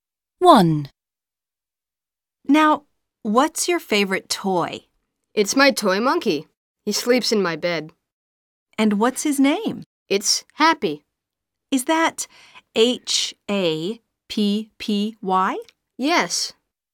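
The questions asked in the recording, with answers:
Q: And what's his name?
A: Happy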